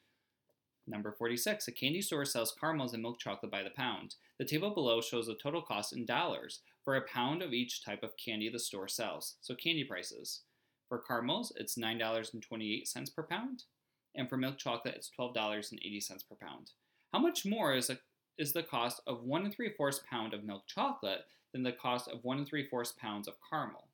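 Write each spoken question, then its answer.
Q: How much more is the cost of 1 3/4 pound of milk chocolate than the cost of 1 3/4 pounds of caramel?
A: $6.16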